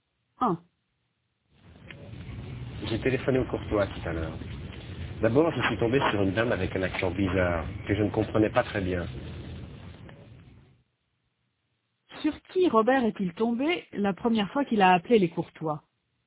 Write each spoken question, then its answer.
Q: Sur qui Robert est-il tombé la première fois qu'il a appelé les Courtois?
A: Sur une dame avec un accent bizarre.